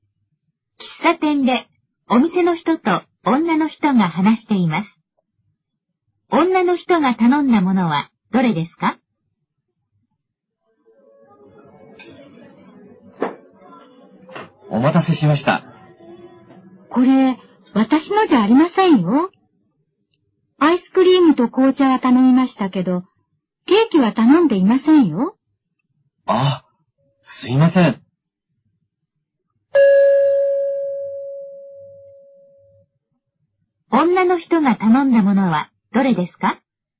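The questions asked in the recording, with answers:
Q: 女の人が頼んだものはどれですか?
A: アイスクリームと紅茶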